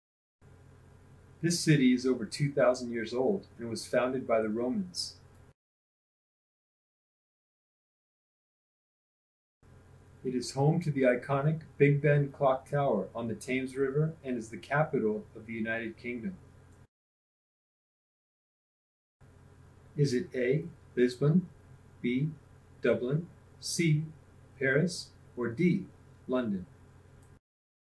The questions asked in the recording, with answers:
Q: Is it A, Lisbon, B, Dublin, C, Paris, or D, London?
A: If you chose London, you're correct.